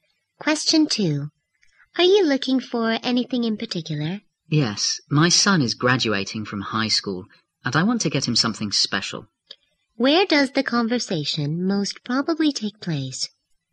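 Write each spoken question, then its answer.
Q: Where does the conversation most probably take place?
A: In a shop.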